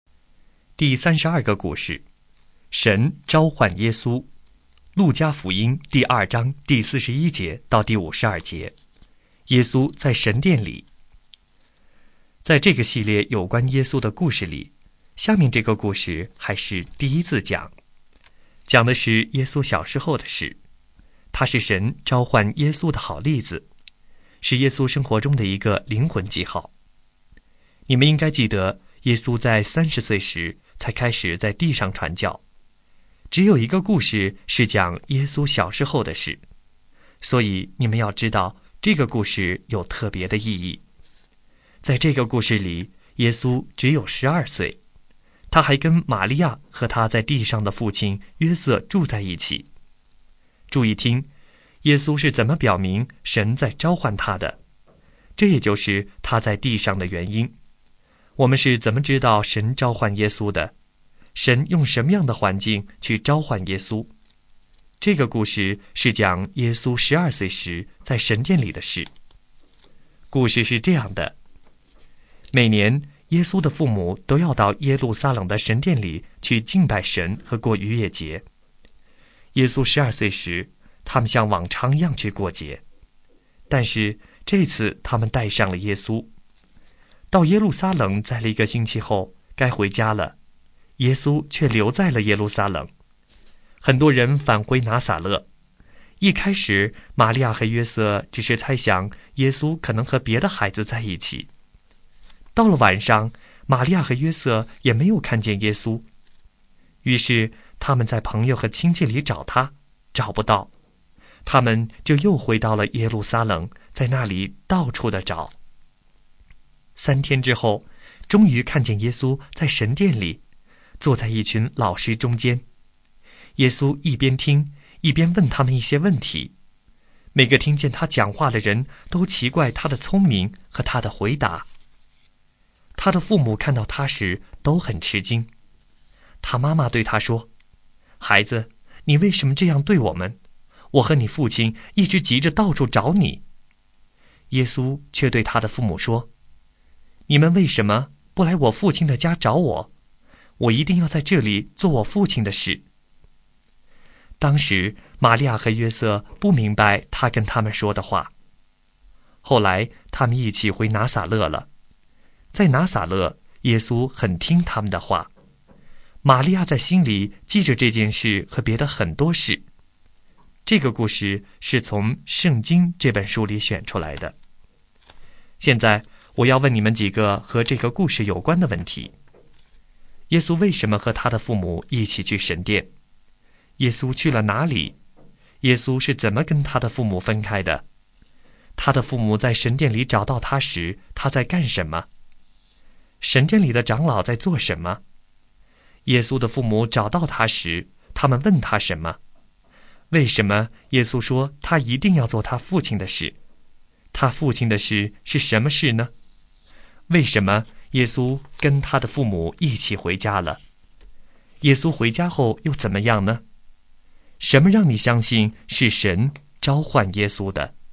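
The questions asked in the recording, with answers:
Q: 耶稣为什么和他的父母一起去神殿?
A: 去敬拜神和过逾越节

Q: 耶稣去了哪里?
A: 耶路撒冷的神殿

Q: 耶稣是怎么跟他的父母分开的?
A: 该回家时他留在了耶路撒冷,父母以为他和别的孩子在一起

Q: 他的父母在神殿里找到他时,他在干什么?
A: 坐在老师中间,一边听一边问他们问题

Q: 耶稣的父母找到他时,他们问他什么?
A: 孩子,你为什么这样对我们?

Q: 耶稣回家后又怎么样呢?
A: 很听父母的话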